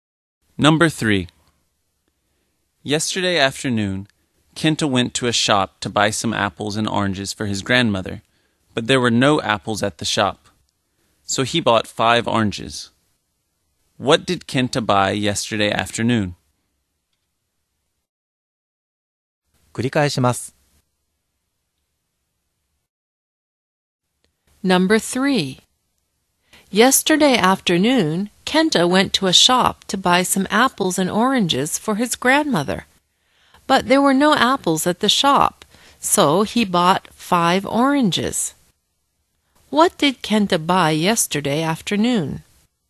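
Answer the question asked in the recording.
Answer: 5 oranges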